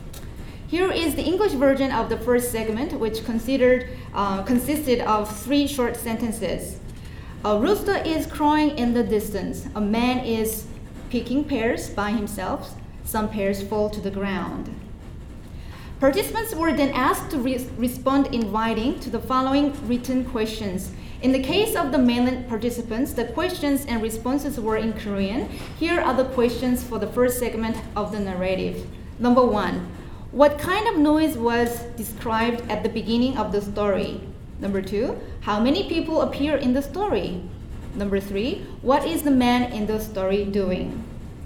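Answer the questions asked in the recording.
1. A rooster crowing
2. One (a man)
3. Picking pears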